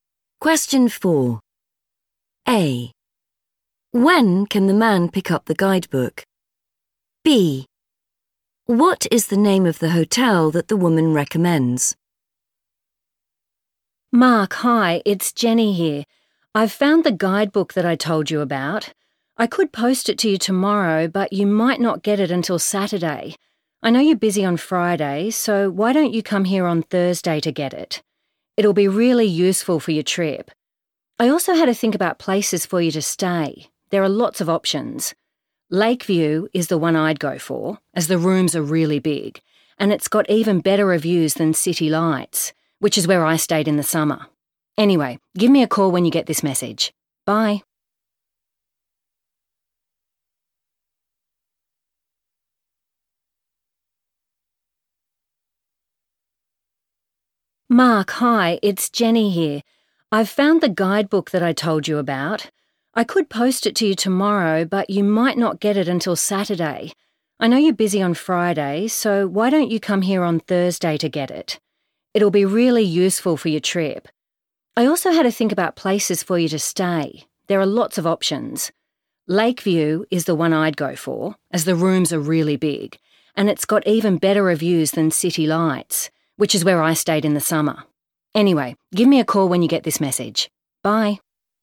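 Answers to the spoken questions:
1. Thursday
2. Lakeview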